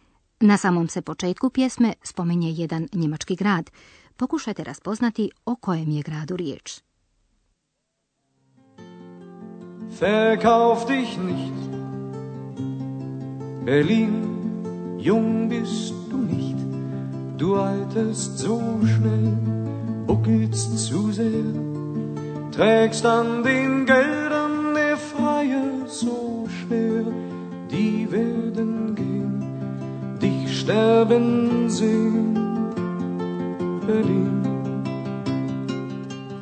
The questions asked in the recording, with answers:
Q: Pokušajte raspoznati o kojem je gradu riječ.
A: Berlin. Berlin.